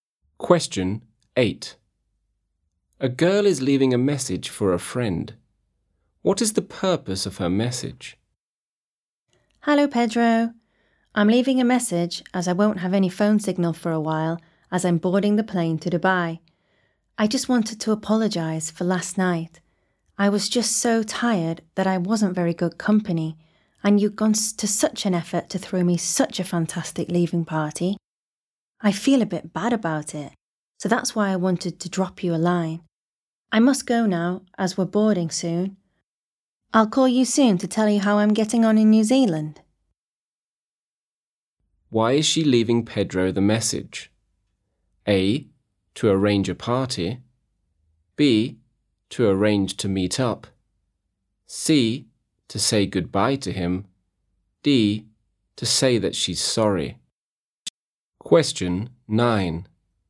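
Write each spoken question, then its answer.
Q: What is the purpose of her message?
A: D: to say that she's sorry.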